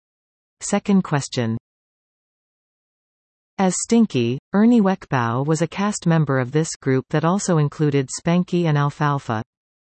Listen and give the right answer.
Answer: The answer? The Little Rascals, or Our Gang.